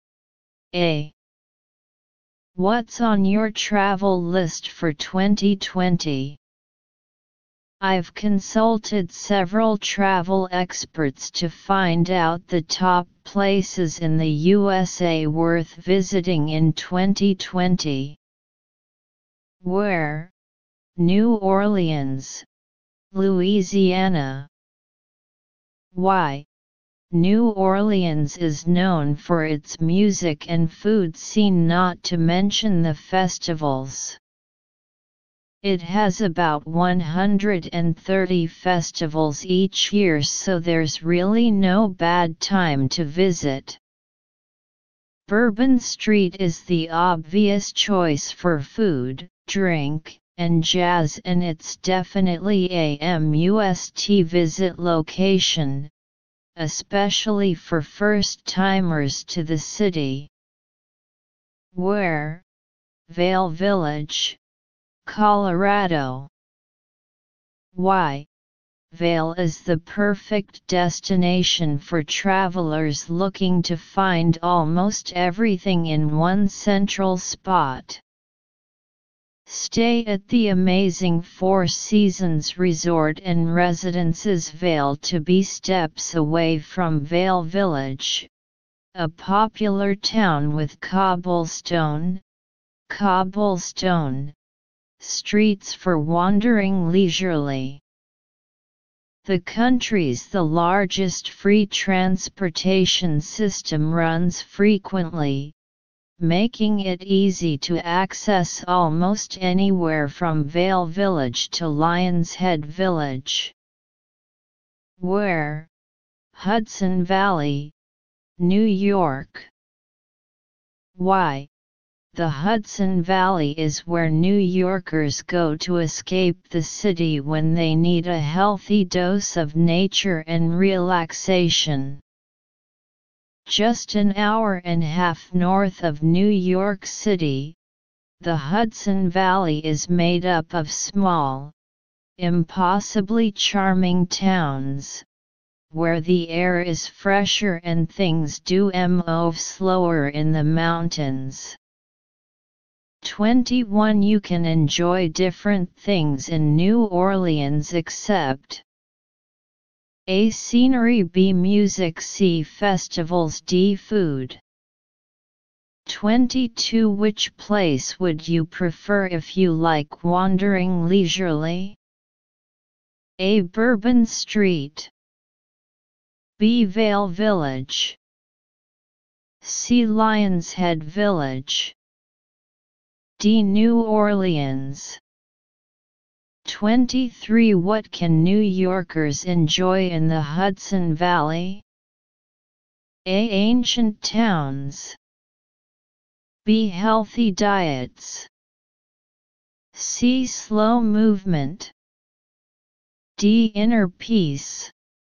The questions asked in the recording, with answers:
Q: You can enjoy different things in New Orleans except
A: Answer 21. A.

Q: Which place would you prefer if you like wandering leisurely?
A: 22, B.

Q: What can New Yorkers enjoy in the Hudson Valley?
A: 23, D.